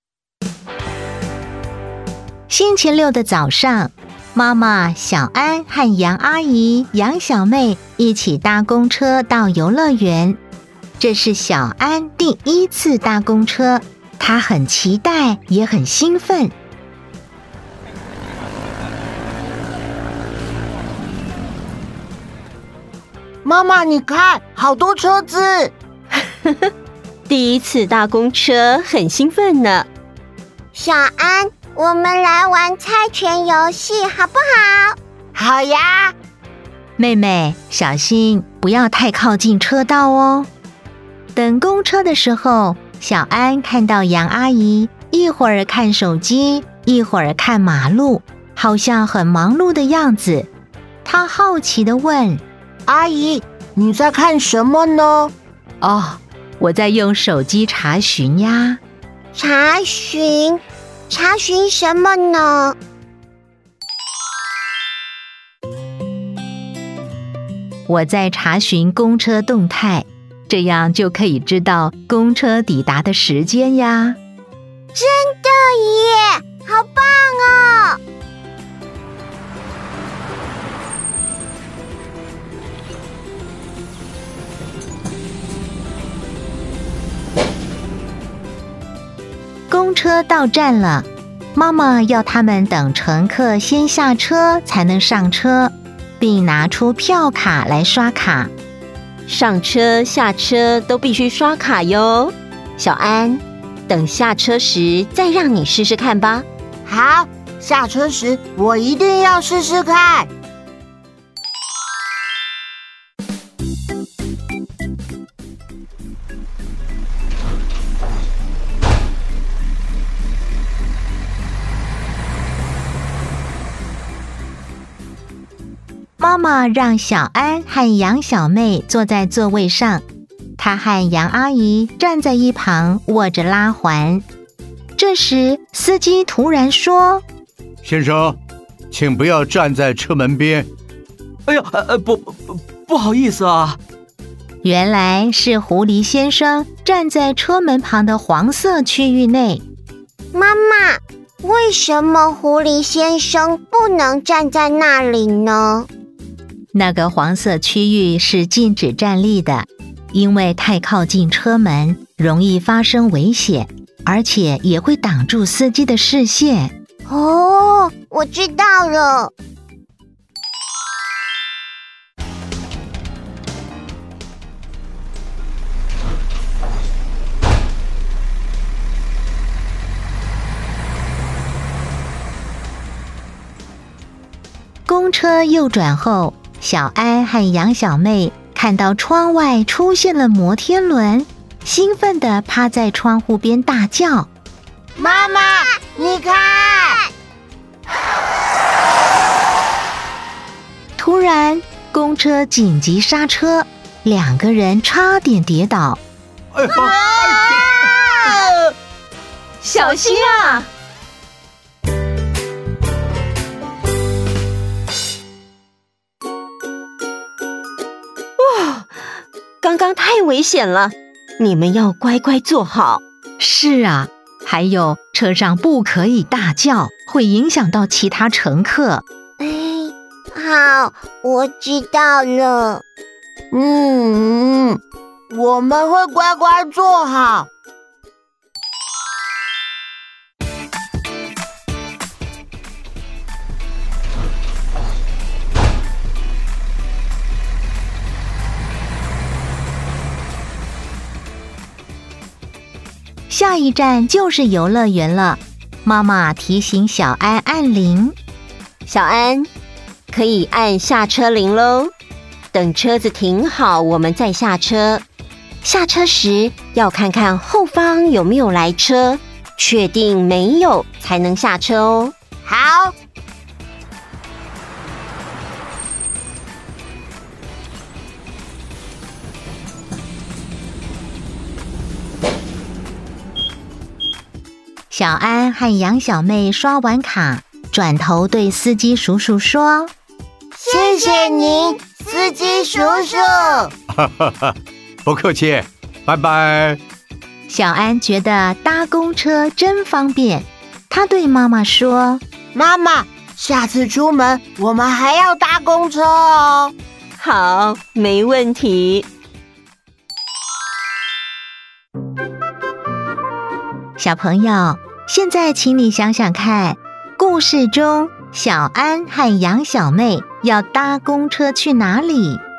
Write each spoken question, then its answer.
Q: 小朋友,现在请你想想看,故事中小安和杨小妹要搭公车去哪里?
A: 游乐园。